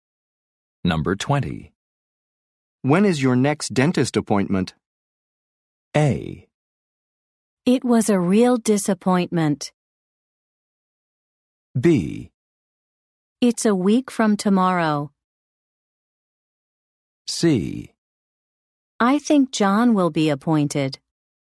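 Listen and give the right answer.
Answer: B: It's a week from tomorrow.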